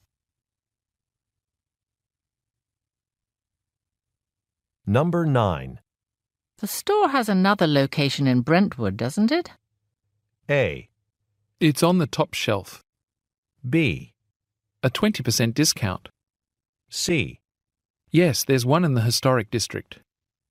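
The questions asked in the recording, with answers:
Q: The store has another location in Brentwood, doesn't it?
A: C: Yes, there's one in the historic district.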